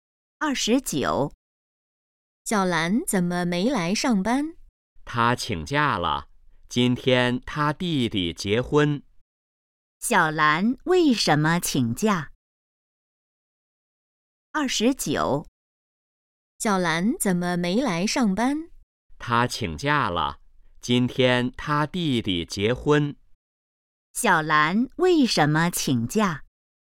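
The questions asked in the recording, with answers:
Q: 小兰为什么请假?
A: 弟弟结婚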